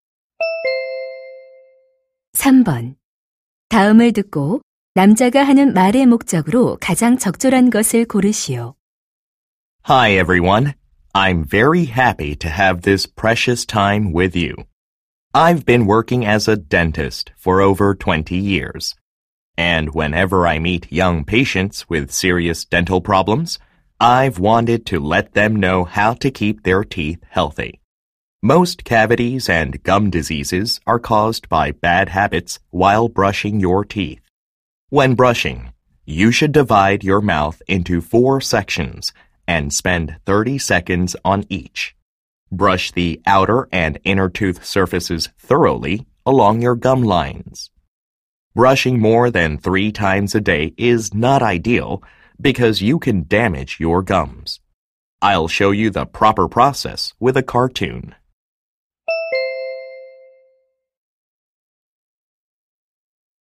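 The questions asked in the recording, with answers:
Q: 다음을 듣고 남자가 하는 말의 목적으로 가장 적절한 것을 고르시오.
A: 올바른 양치질 방법을 알려 주려고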